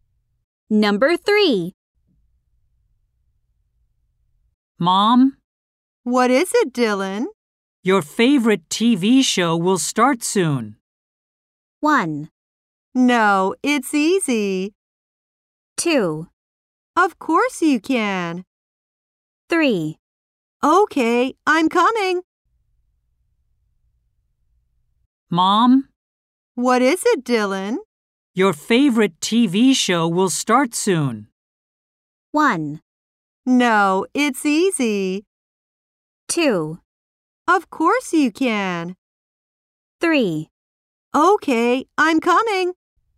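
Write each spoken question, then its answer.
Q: Your favorite TV show will start soon.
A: 3: Okay, I'm coming.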